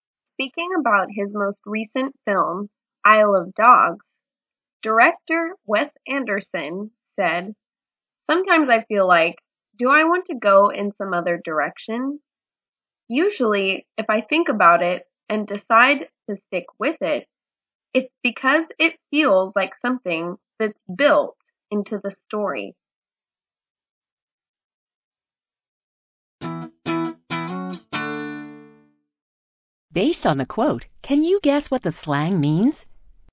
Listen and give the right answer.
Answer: Stick with is an expression meaning continue using, continue doing.